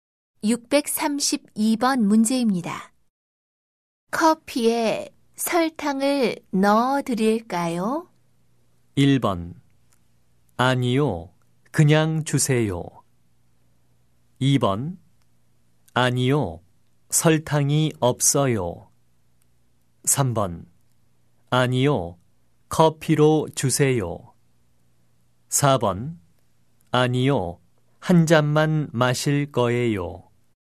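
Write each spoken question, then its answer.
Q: 커피에 설탕을 넣어 드릴까요?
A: 1: 아니요, 그냥 주세요.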